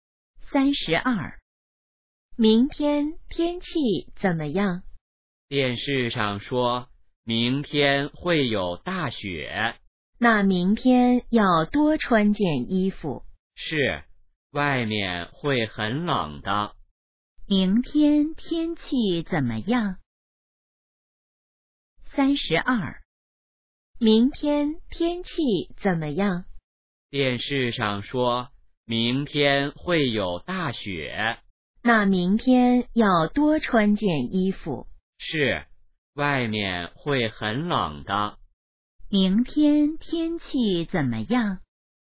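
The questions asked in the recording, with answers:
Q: 明天天气怎么样?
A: 会有大雪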